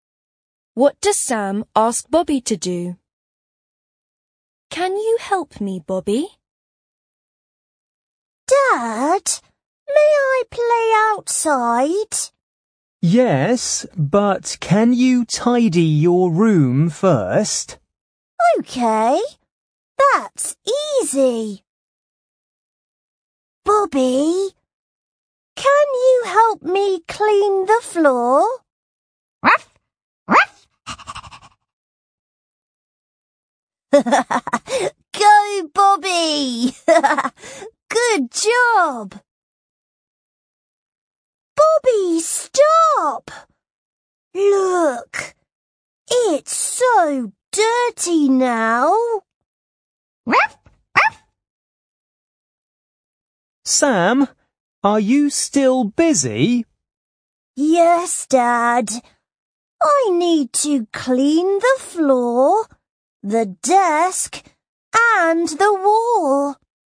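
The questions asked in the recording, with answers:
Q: What does Sam ask Bobby to do?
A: To help him clean the floor.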